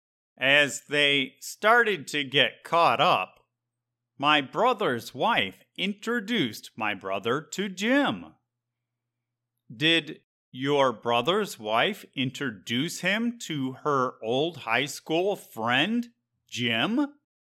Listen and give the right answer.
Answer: Yes. My brother's wife introduced him to Jim.